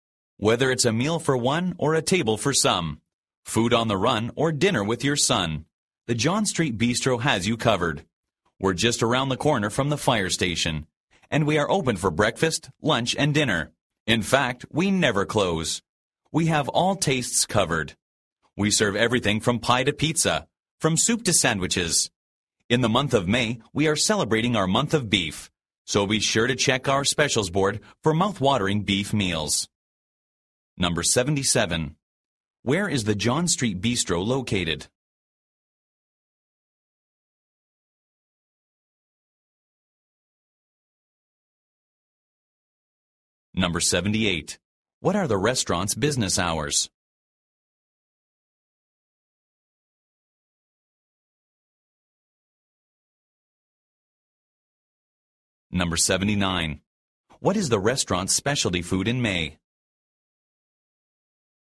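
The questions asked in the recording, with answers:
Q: Where is the John Street Bistro located?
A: Around the corner from the fire station

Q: What are the restaurant's business hours?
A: It never closes (open 24 hours)

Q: What is the restaurant's specialty food in May?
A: Beef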